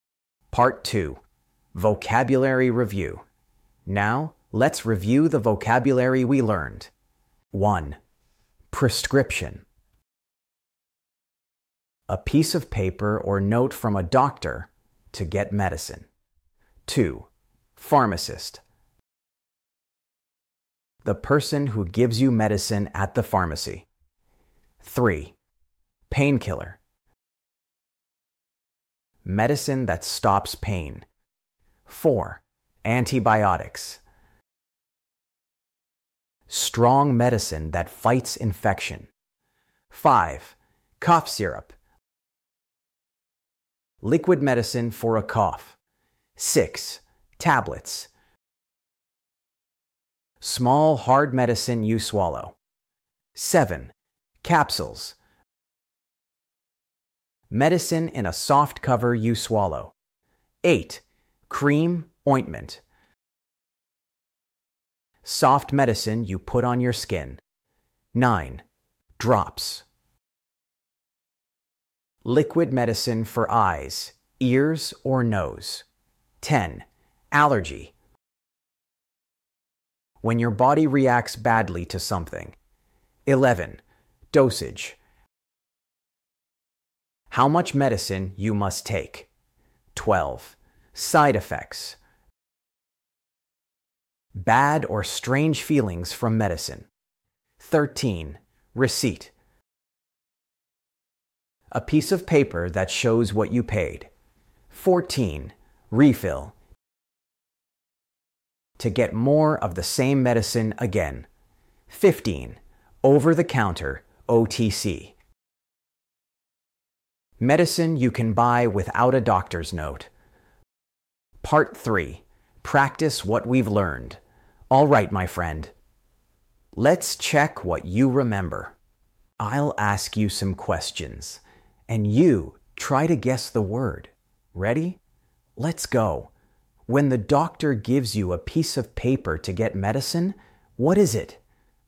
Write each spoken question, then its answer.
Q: when the doctor gives you a piece of paper to get medicine, what is it?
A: That's right, prescription.